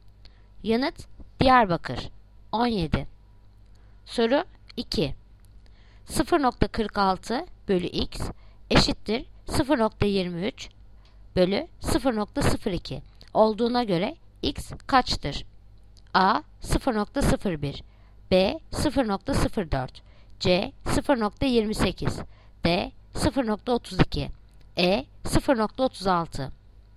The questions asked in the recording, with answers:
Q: 0,46 bölü x eşittir 0,23 bölü 0,02 olduğuna göre x kaçtır?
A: Yanıt Bursa 0,04.